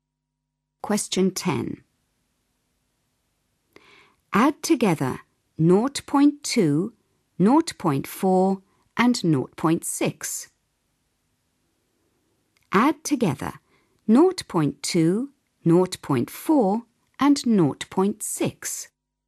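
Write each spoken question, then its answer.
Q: Add together 0.2, 0.4 and 0.6.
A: 1.2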